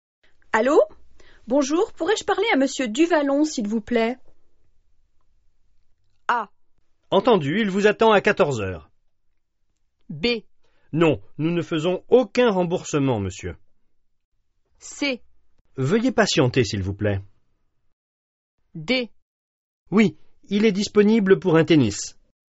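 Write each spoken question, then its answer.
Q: Allô? Bonjour, pourrais-je parler à Monsieur Duvallon, s'il vous plaît?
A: C: Veuillez patienter, s'il vous plaît.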